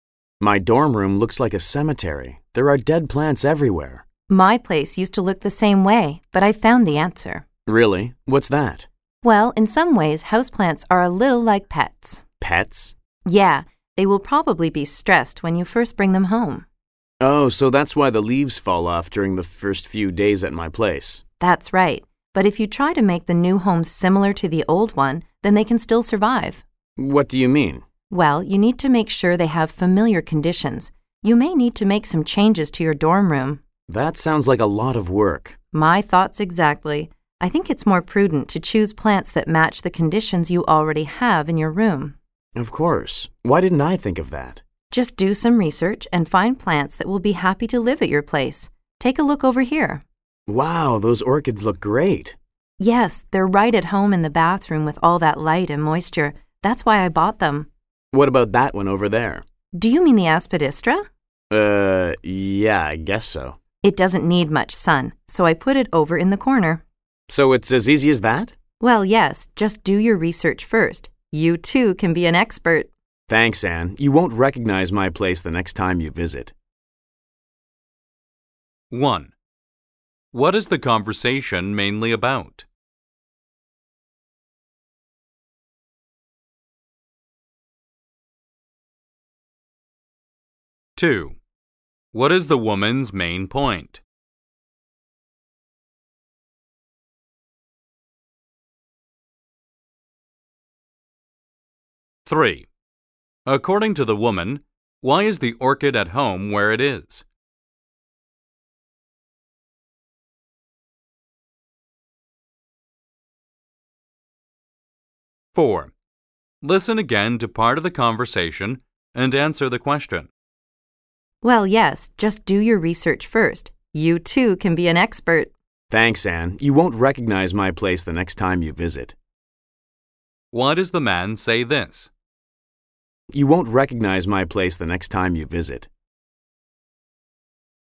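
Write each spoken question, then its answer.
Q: What is the conversation mainly about?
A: Keeping houseplants alive in a dorm room

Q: What is the woman's main point?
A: Choose plants that suit the conditions you already have

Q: According to the woman, why is the orchid at home where it is?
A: The bathroom has plenty of light and moisture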